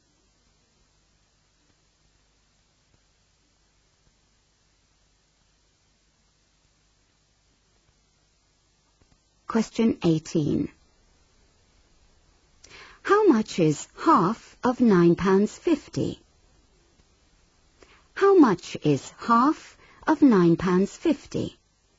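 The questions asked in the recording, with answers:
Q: How much is half of £9.50?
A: £4.75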